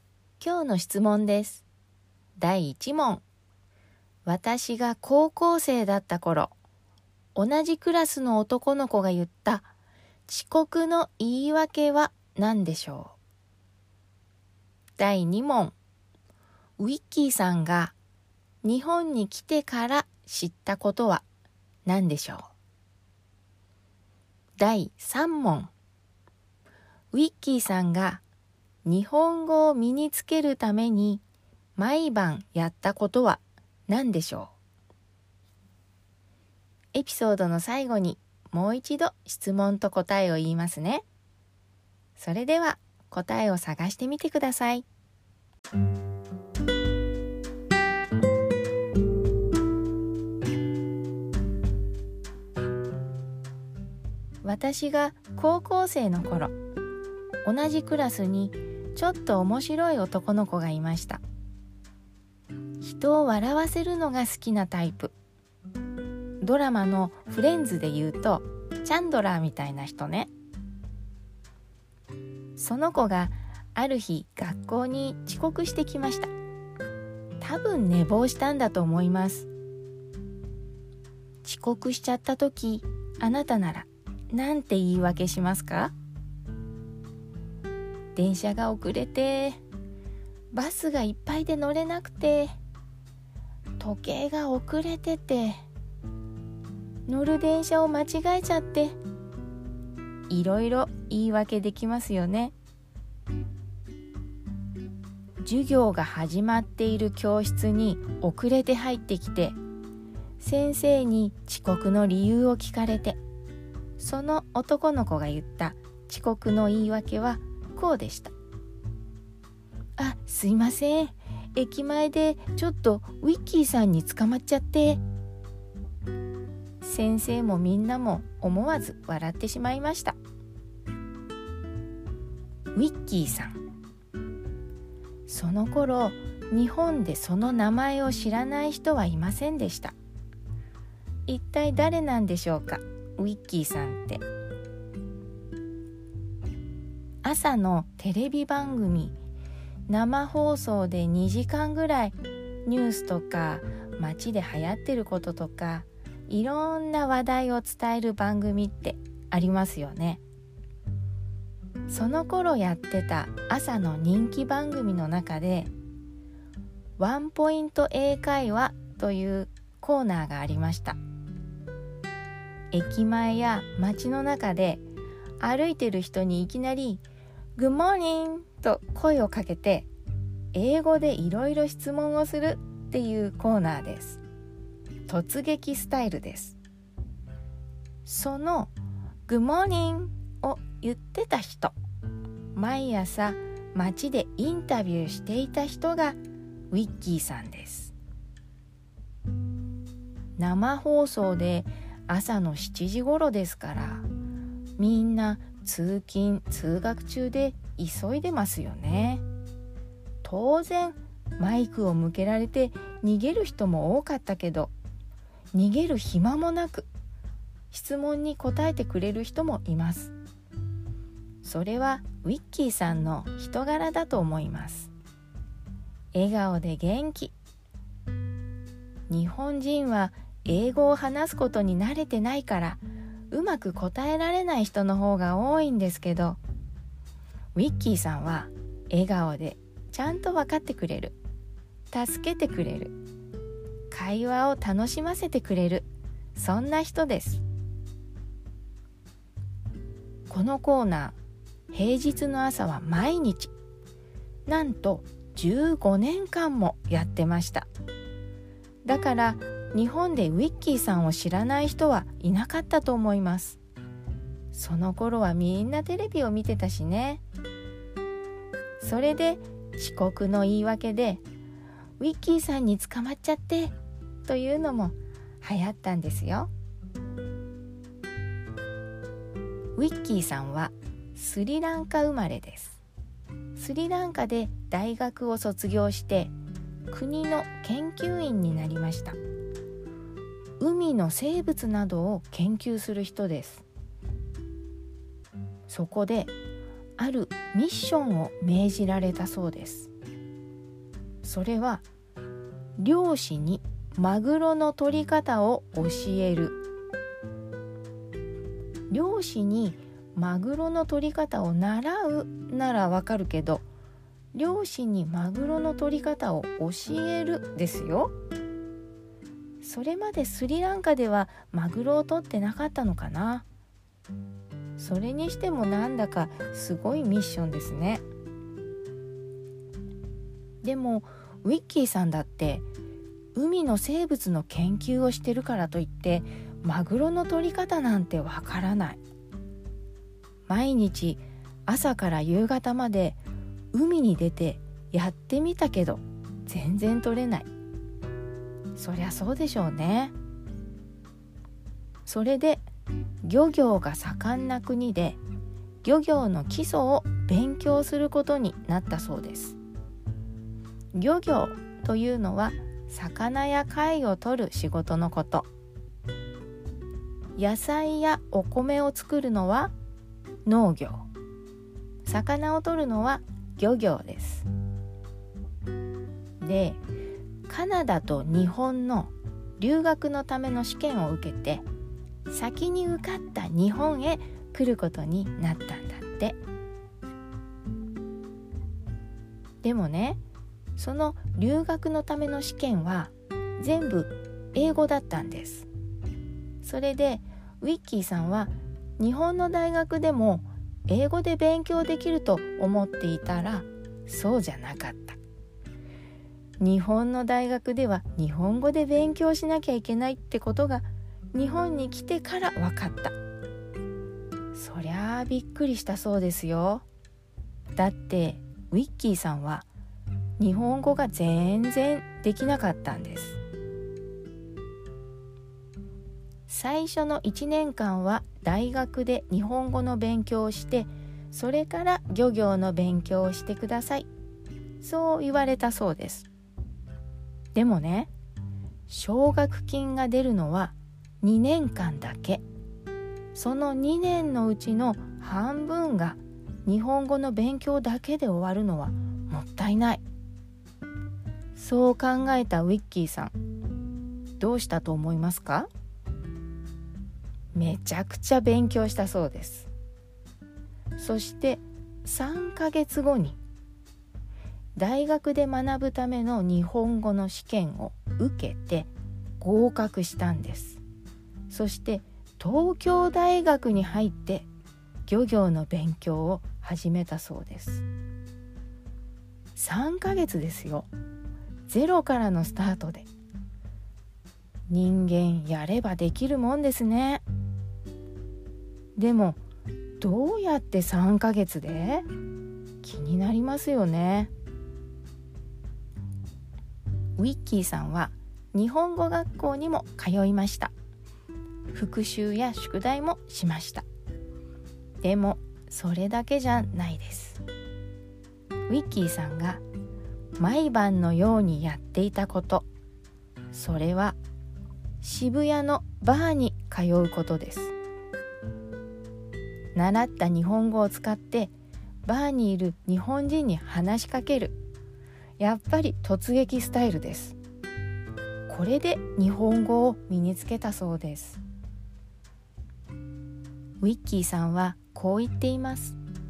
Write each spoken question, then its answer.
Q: 私が高校生だった頃、同じクラスの男の子が言った遅刻の言い訳は何でしょう。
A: これは、あ、すいません、駅前でちょっとウィッキーさんに捕まっちゃって、でしたね。

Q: ウィッキーさんが日本に来てから知ったことは何でしょう。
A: これは、日本の大学では日本語で勉強しなきゃいけないということ。

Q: ウィッキーさんが日本語を身につけるために毎晩やったことは何でしょう。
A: これは、渋谷のバーに通って習った日本語を使って日本人に話しかけた。